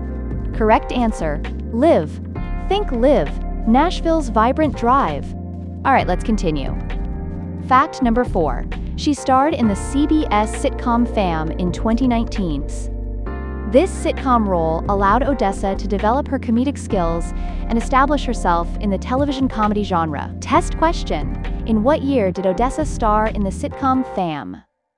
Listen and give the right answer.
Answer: 2019.